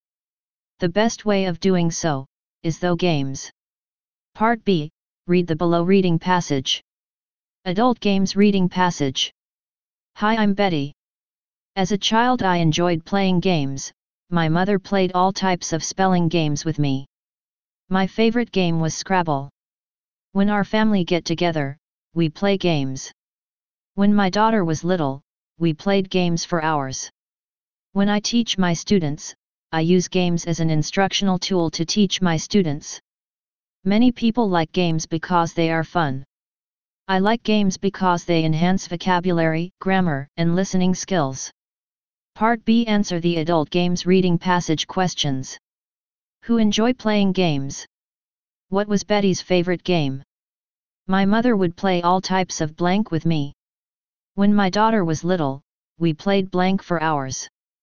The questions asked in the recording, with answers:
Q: Who enjoy playing games?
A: 1 Betty.

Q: What was Betty's favorite game?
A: 2 Scrabble.

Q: My mother would play all types of blank with me.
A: 3 Games.

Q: When my daughter was little, we played blank for hours.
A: 4 Games.